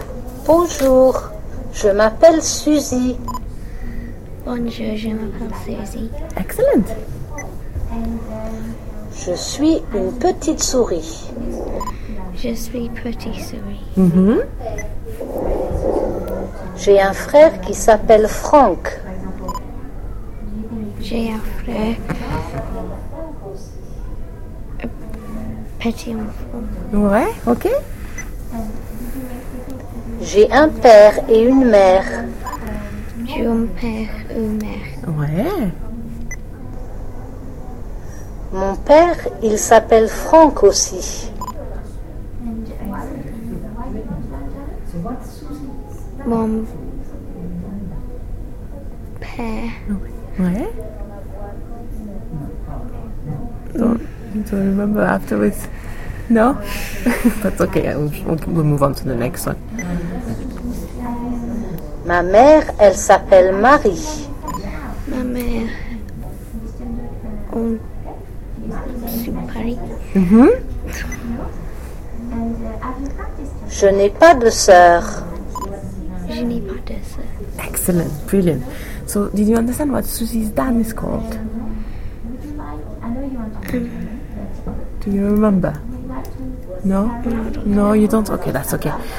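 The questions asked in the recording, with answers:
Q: So, did you understand what Susie's dad is called?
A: Franck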